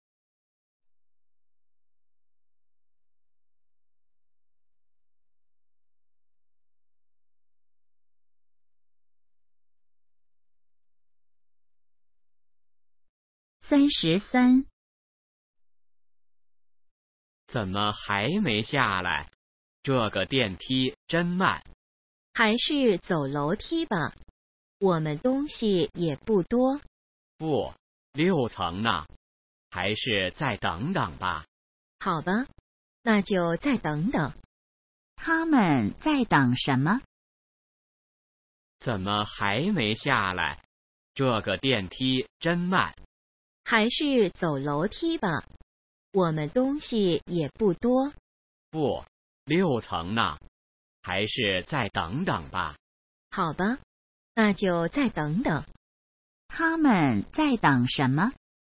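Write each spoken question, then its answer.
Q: 他们在等什么?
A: 电梯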